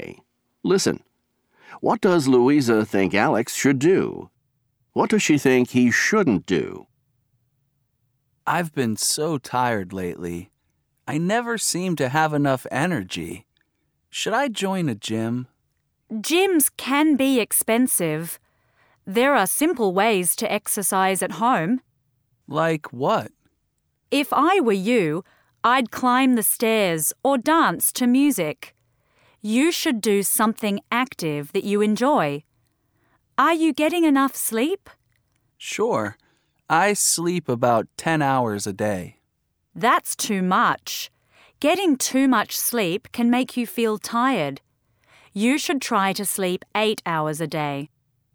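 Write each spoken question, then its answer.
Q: What does Louisa think Alex should do?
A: Exercise at home, like climbing stairs or dancing to music, and sleep 8 hours a day

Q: What does she think he shouldn't do?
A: Join a gym or sleep too much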